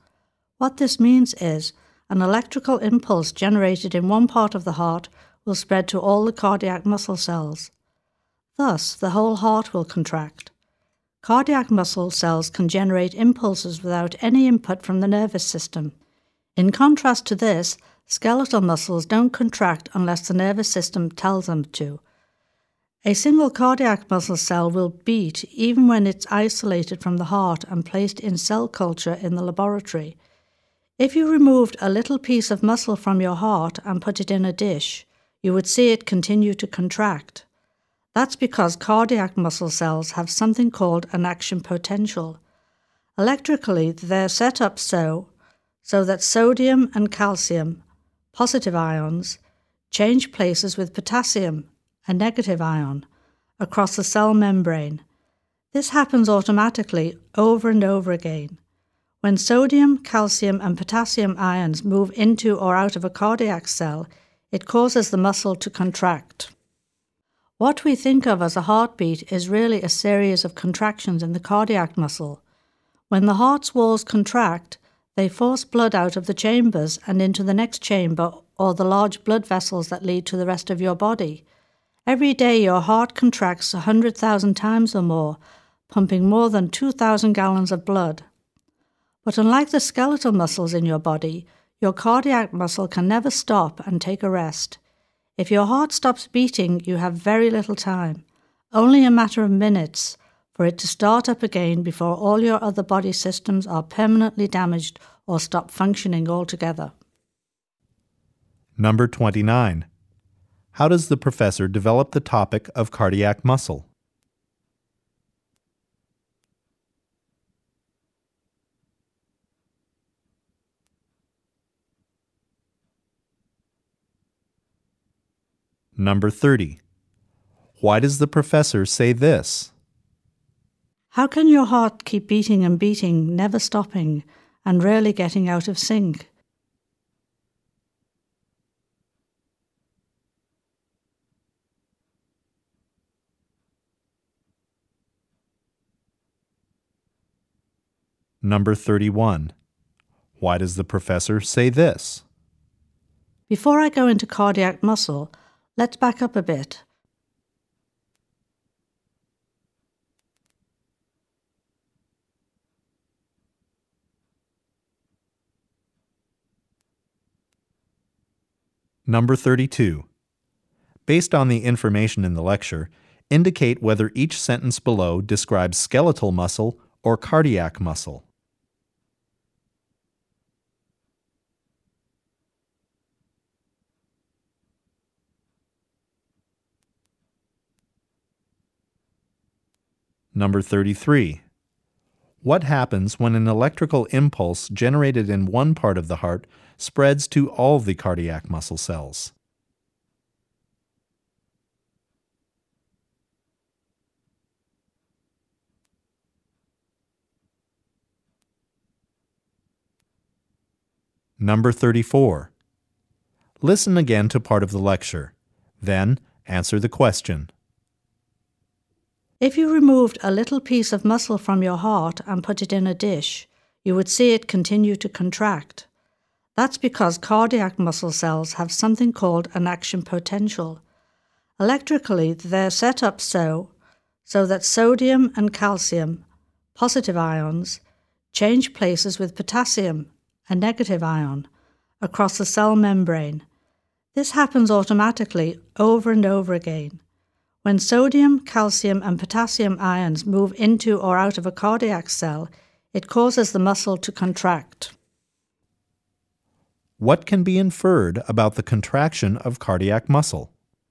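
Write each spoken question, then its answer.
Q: What happens when an electrical impulse generated in one part of the heart spreads to all the cardiac muscle cells?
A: The whole heart contracts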